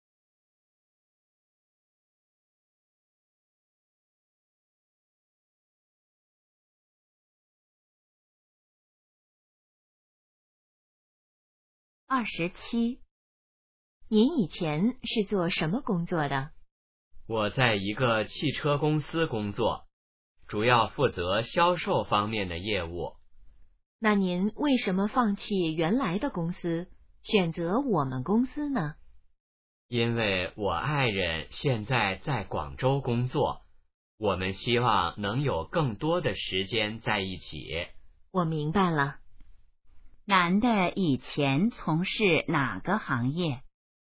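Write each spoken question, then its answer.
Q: 男的以前从事哪个行业?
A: 汽车销售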